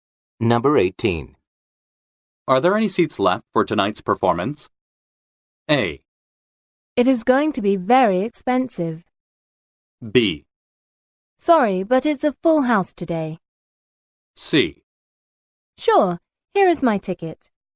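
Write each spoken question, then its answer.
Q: Are there any seats left for tonight's performance?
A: B: Sorry, but it's a full house today.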